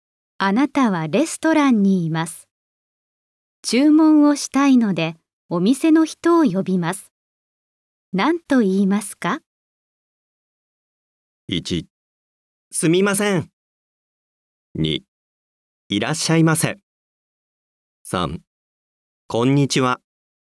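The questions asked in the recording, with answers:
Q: あなたはレストランにいます。注文をしたいので、お店の人を呼びます。何と言いますか?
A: 1: すみません。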